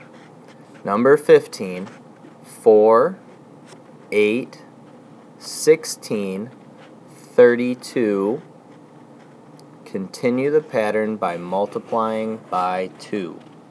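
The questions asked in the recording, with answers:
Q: Number 15, 4, 8, 16, 32. Continue the pattern by multiplying by 2.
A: 64, 128, 256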